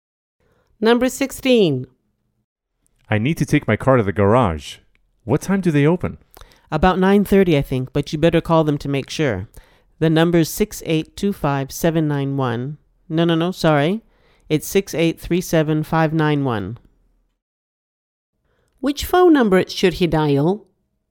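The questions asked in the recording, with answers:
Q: Which phone number should he dial?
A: 6837591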